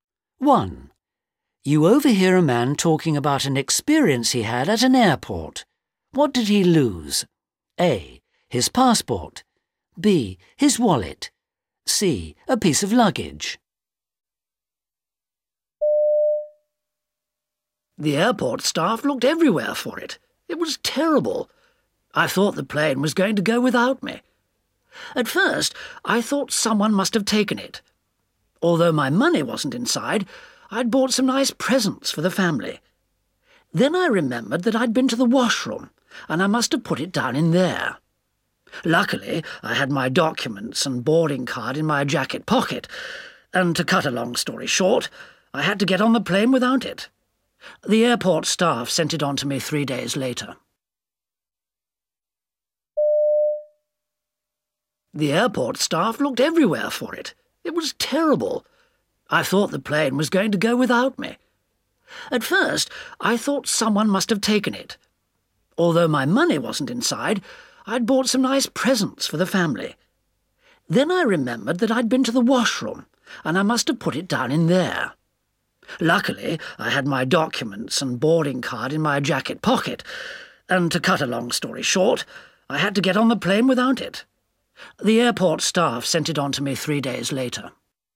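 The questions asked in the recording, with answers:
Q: What did he lose? A. His passport. B. His wallet. C. A piece of luggage.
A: C: A piece of luggage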